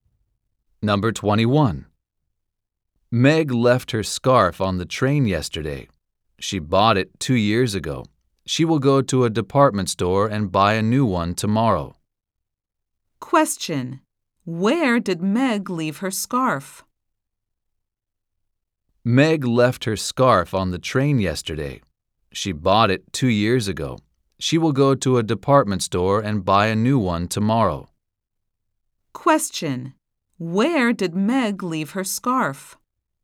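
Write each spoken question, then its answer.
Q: Where did Meg leave her scarf?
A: On the train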